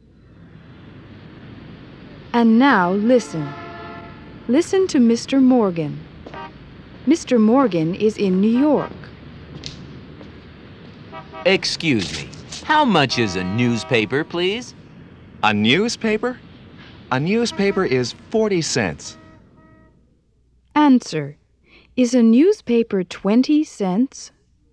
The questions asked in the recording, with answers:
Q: Is a newspaper 20 cents?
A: No, it's not.